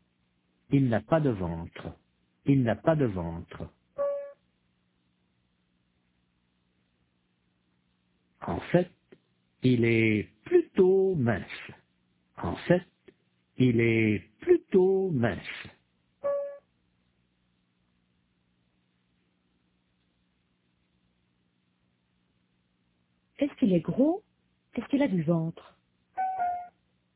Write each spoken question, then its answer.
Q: Est-ce qu'il est gros? Est-ce qu'il a du ventre?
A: Non, il n'est pas gros du tout.